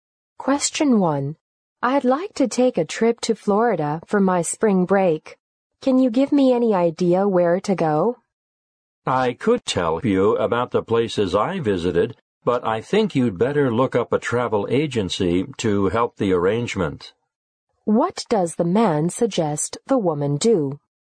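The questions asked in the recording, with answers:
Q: What does the man suggest the woman do?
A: Ask a travel agency to help with the arrangements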